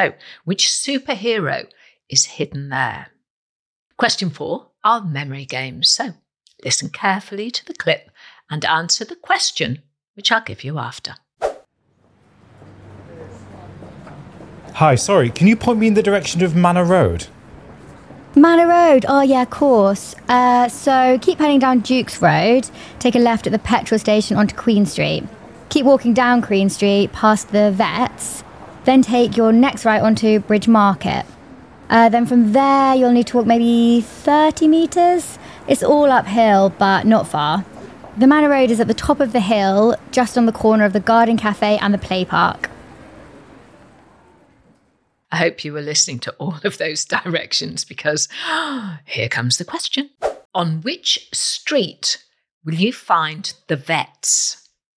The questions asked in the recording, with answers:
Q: On which street will you find the vets?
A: It was Queen Street.